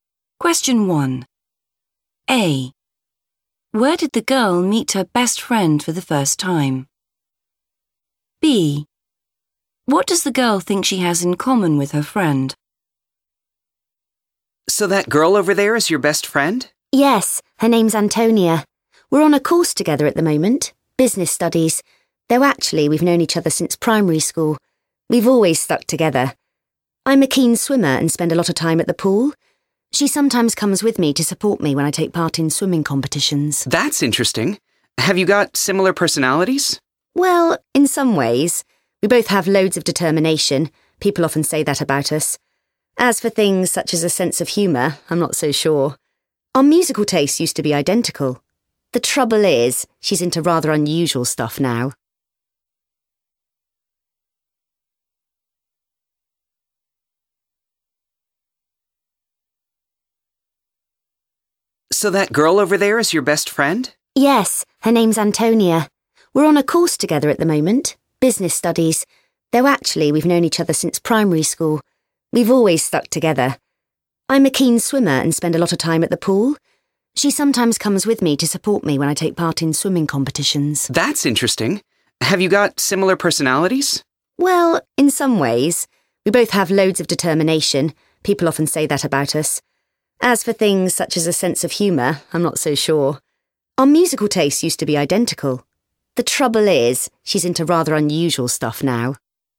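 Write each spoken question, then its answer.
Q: Where did the girl meet her best friend for the first time?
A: at primary school

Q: What does the girl think she has in common with her friend?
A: determination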